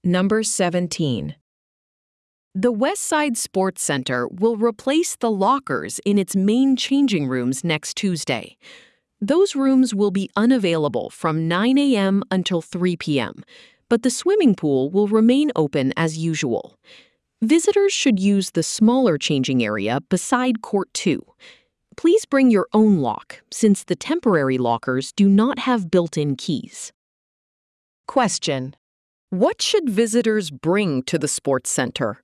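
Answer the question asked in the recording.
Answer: Their own lock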